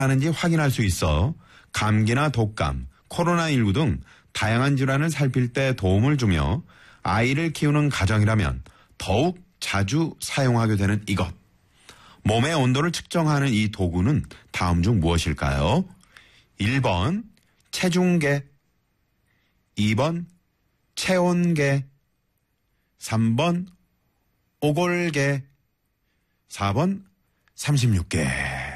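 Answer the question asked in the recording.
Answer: 2번: 체온계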